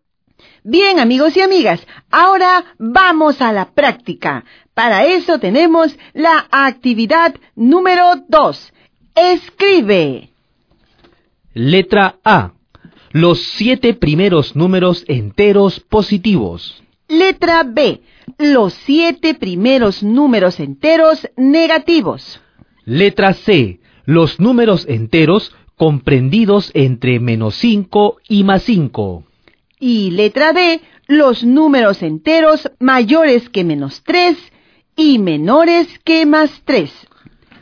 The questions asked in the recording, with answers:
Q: Letra A. Los 7 primeros números enteros positivos.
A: 1, 2, 3, 4, 5, 6 y 7.

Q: Letra C. Los números enteros comprendidos entre menos 5 y más 5.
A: menos 4, menos 3, menos 2, menos 1, 0, 1, 2, 3 y 4.